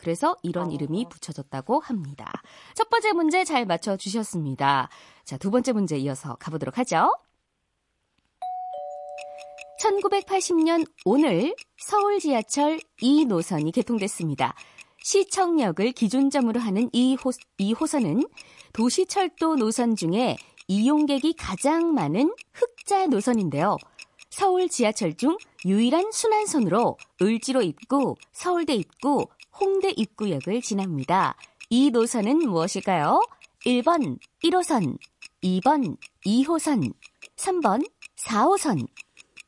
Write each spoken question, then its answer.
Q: 이 노선은 무엇일까요?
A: 2번 2호선 정답입니다.